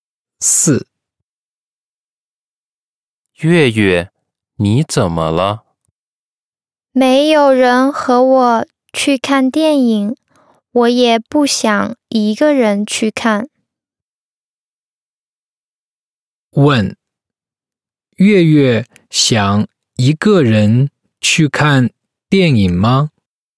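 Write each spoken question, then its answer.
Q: 月月想一个人去看电影吗?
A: 不想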